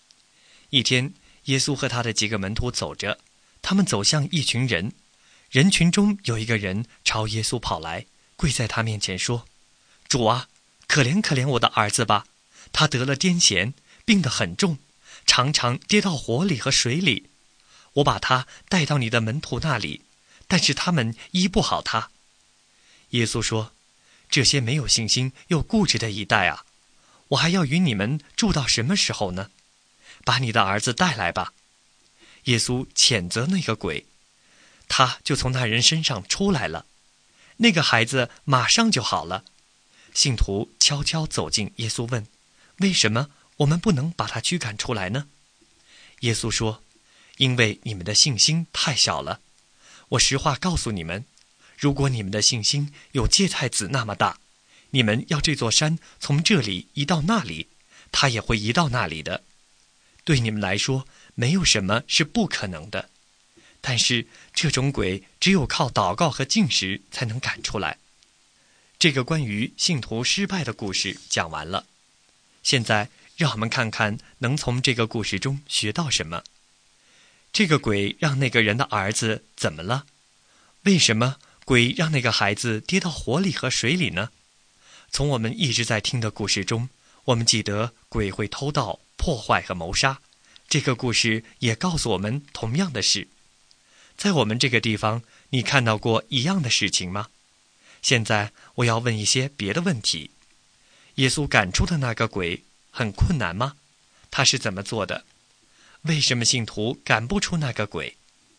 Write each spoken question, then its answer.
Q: 为什么信徒赶不出那个鬼?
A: 信徒问耶稣时,耶稣说那也是他们的信心太小了,接着他又说禁食和祷告才能把鬼赶出来。